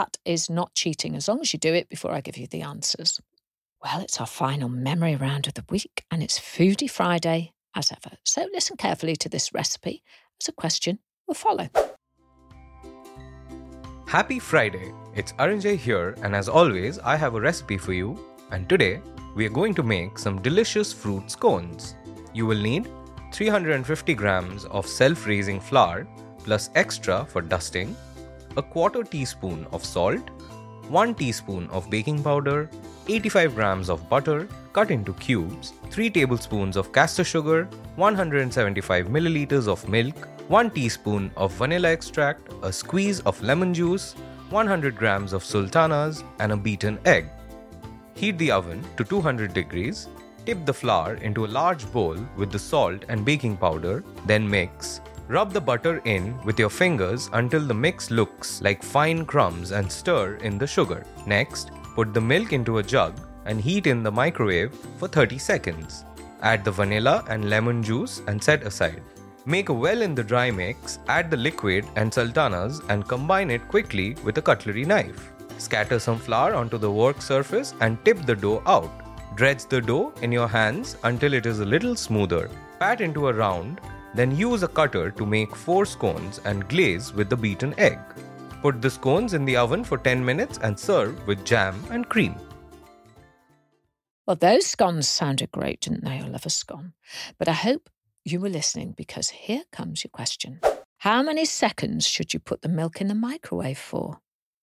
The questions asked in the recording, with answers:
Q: How many seconds should you put the milk in the microwave for?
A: And the answer is, put it in the microwave for 30 seconds.